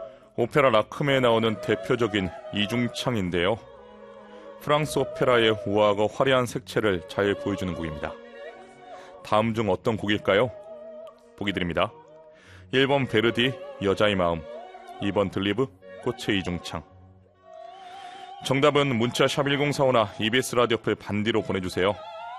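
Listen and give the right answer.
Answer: 2: 들리브, 꽃의 이중창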